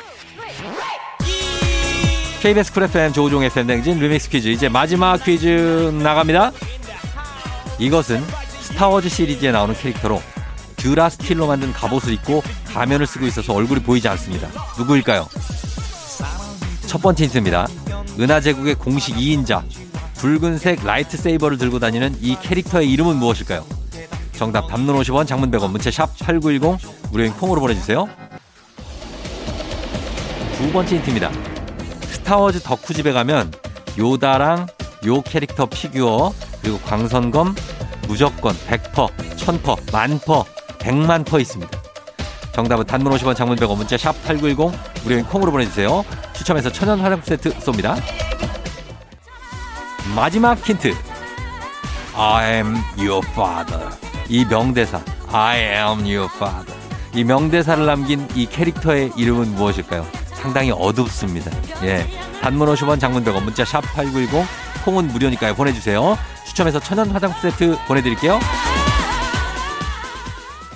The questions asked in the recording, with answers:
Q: 이것은 스타워즈 시리즈에 나오는 캐릭터로 듀라 스틸로 만든 갑옷을 입고 가면을 쓰고 있어서 얼굴이 보이지 않습니다.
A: 정답은 바로 두구두구두구두구두구두구두구 다스베이더죠.